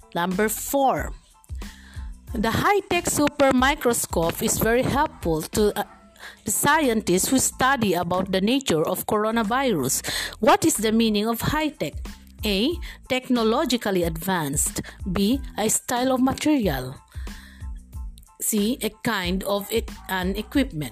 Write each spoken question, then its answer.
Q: What is the meaning of high-tech?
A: Yes, letter A, technologically advanced.